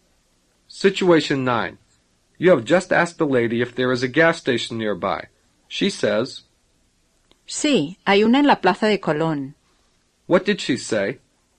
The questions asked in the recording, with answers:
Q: What did she say?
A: She said, yes, there is one in the Plaza de Colón.